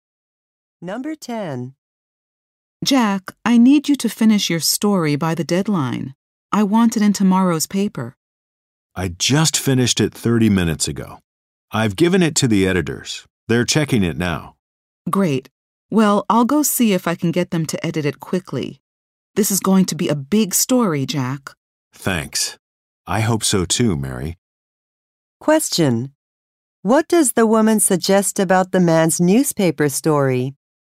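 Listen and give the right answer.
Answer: It will be a big story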